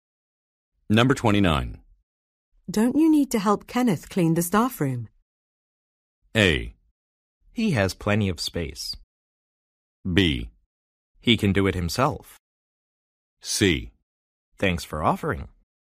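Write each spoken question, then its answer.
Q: Don't you need to help Kenneth clean the staff room?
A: B: He can do it himself.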